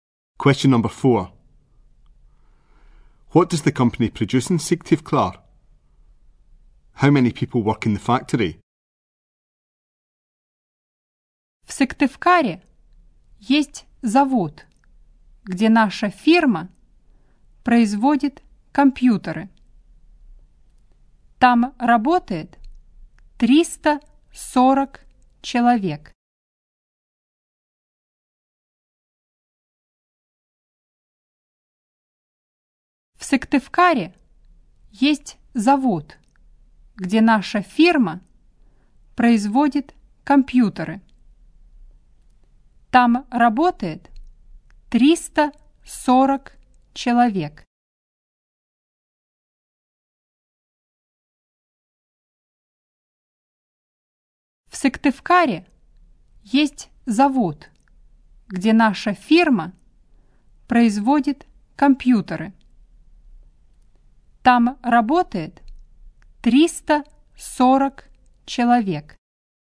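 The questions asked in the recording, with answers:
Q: What does the company produce in Syktyvkar?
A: Computers

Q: How many people work in the factory?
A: 340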